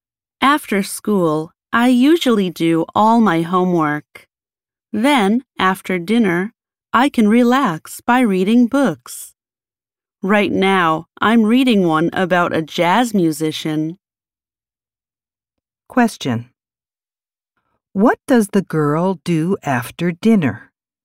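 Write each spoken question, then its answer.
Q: What does the girl do after dinner?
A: She reads books.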